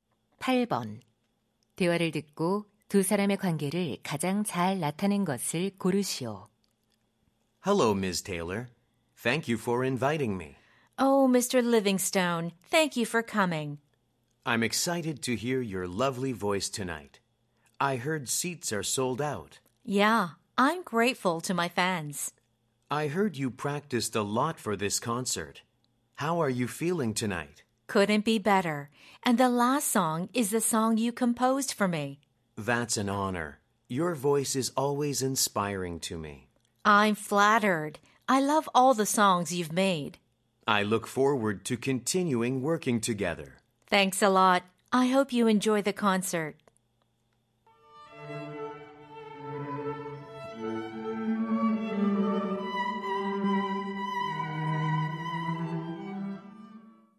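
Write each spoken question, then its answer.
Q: 대화를 듣고 두 사람의 관계를 가장 잘 나타낸 것을 고르시오.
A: 가수와 작곡가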